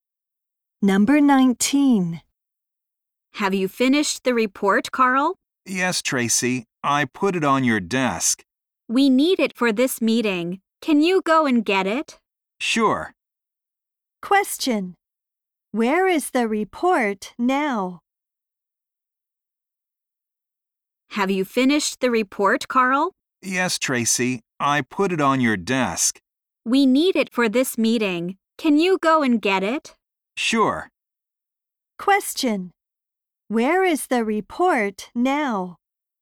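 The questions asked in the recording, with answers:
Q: Where is the report now?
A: On Tracy's desk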